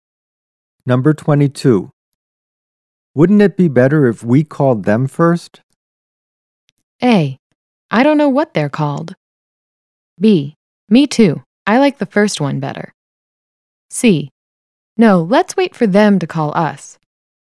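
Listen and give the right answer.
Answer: C: No, let's wait for them to call us.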